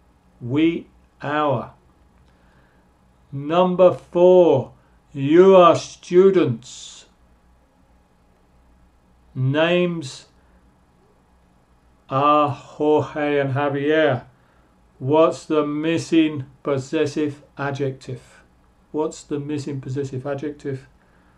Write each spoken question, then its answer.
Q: What's the missing possessive adjective?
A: you are students, your.